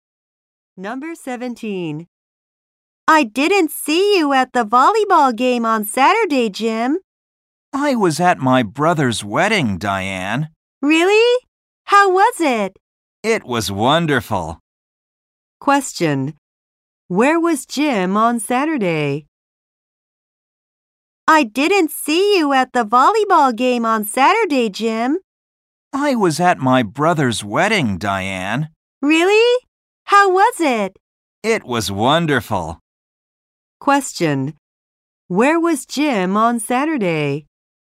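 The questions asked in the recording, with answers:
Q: Where was Jim on Saturday?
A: At his brother's wedding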